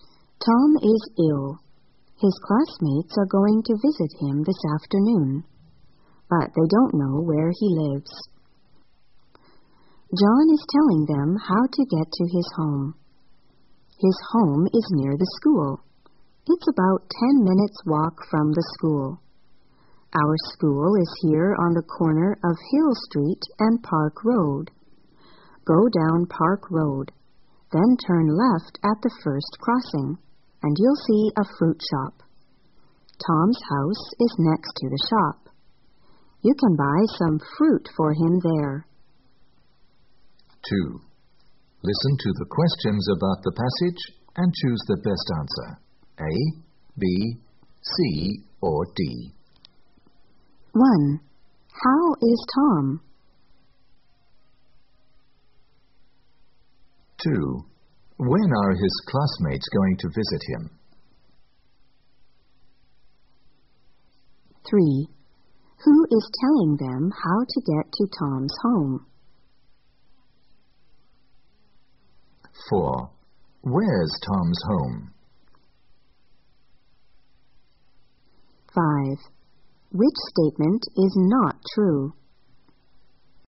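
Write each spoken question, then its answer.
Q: How is Tom?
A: He is ill.

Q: When are his classmates going to visit him?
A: This afternoon.

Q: Who is telling them how to get to Tom's home?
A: John.

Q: Where's Tom's home?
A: Next to the fruit shop, near the school.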